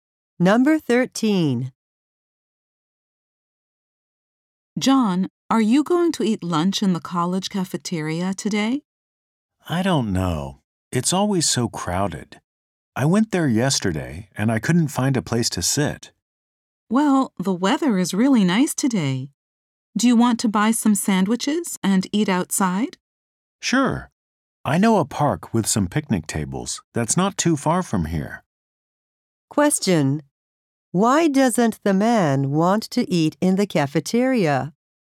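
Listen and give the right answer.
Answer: It is always too crowded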